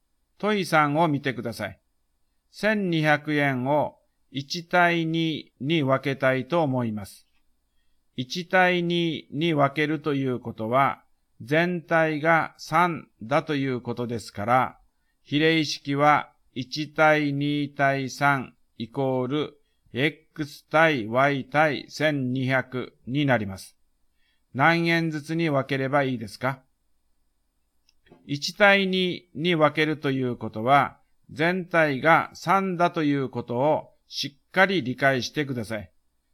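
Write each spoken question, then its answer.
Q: 何円ずつに分ければいいですか?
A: 400円と800円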